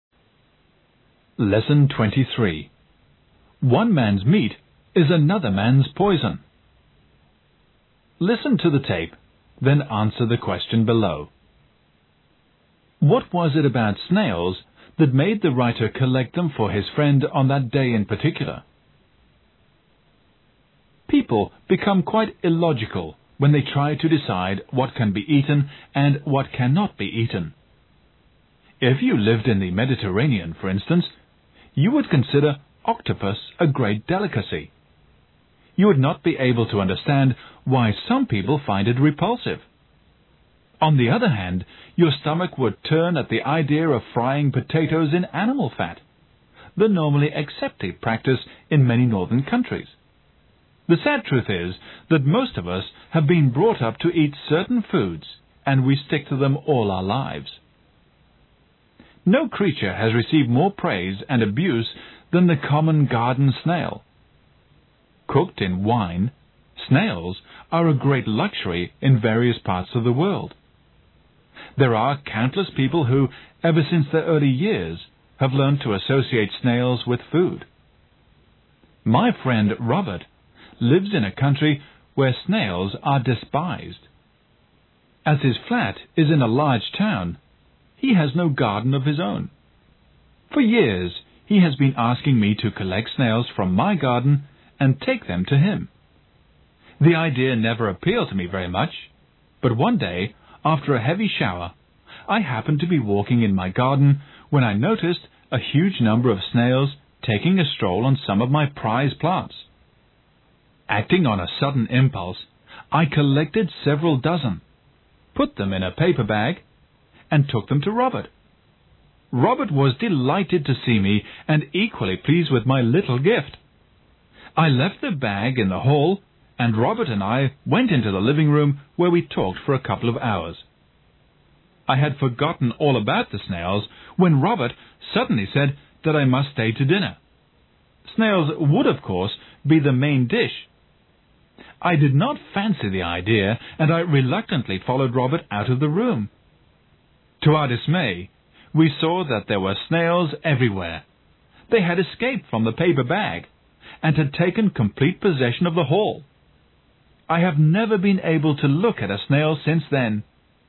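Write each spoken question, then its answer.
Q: What was it about snails that made the writer collect them for his friend on that day in particular?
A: After a heavy shower, a huge number of snails were crawling over his prize plants in his garden.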